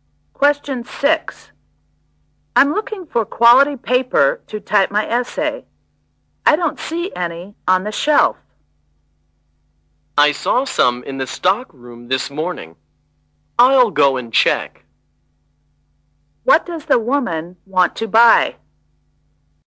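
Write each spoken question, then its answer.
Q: What does the woman want to buy?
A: Quality paper to type her essay.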